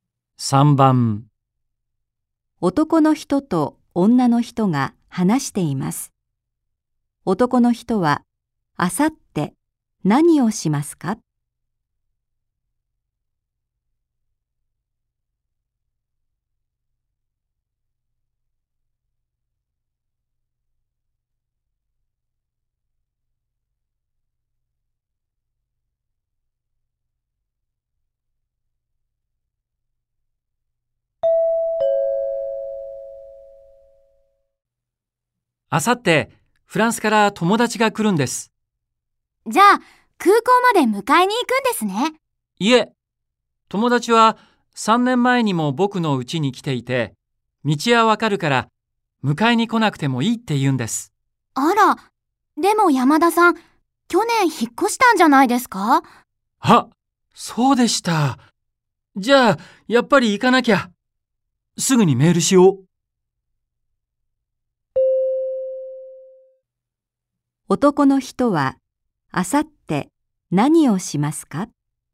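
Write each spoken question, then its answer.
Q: 男の人は、あさって何をしますか?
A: 空港へ友達を迎えに行く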